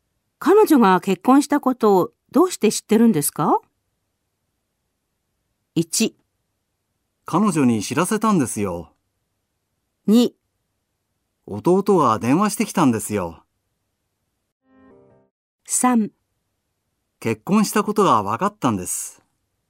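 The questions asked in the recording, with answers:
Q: 彼女が結婚したことをどうして知ってるんですか?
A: 2: 弟が電話してきたんですよ。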